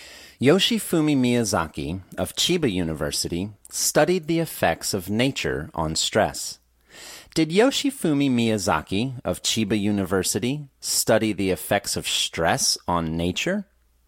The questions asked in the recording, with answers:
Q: Did Yoshifumi Miyazaki of Chiba University study the effects of stress on nature?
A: No, Miyazaki didn't study the effects of stress on nature.